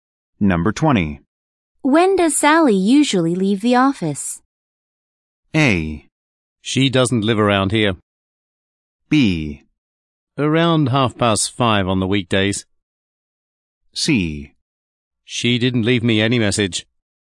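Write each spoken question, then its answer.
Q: When does Sally usually leave the office?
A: B: Around 5:30 on the weekdays.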